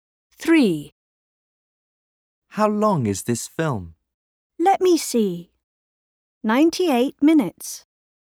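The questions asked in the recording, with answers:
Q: How long is this film?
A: 98 minutes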